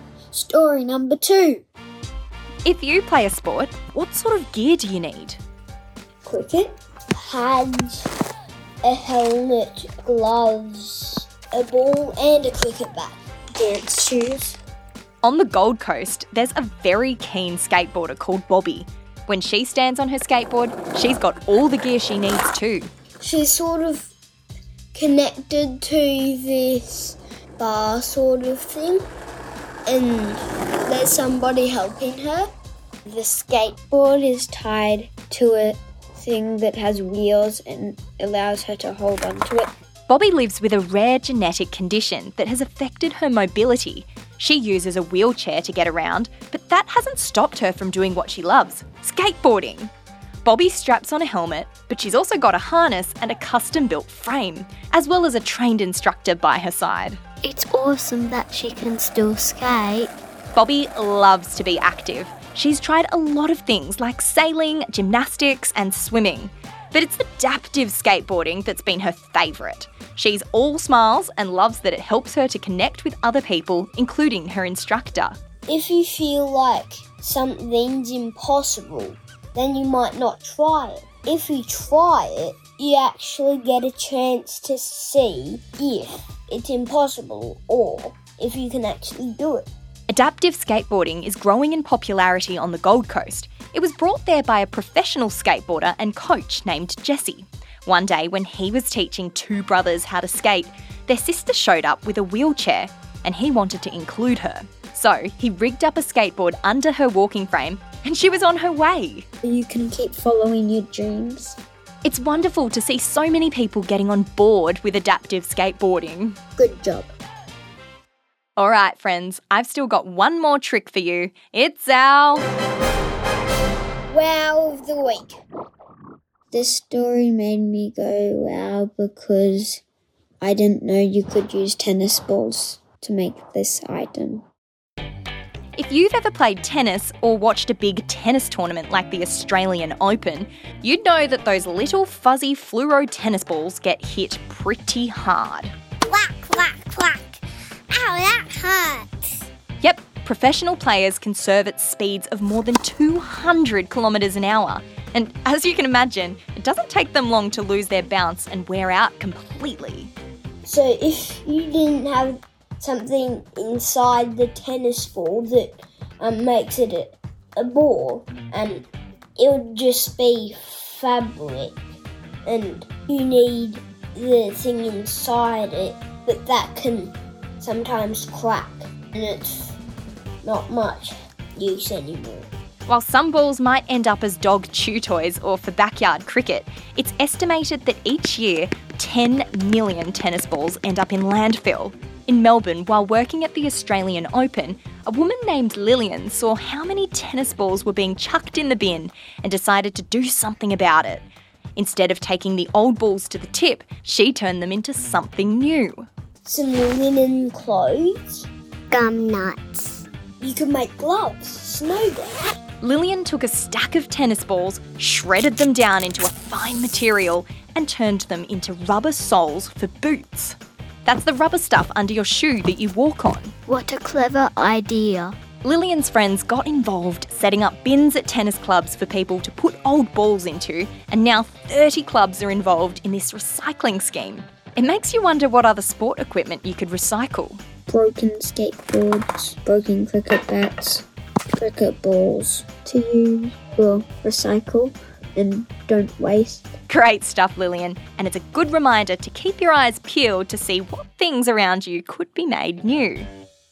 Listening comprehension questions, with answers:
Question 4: What is the name of the sport that Bobby loves?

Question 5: How many tennis balls go into landfill each year in Australia?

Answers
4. Adaptive skateboarding
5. 10 million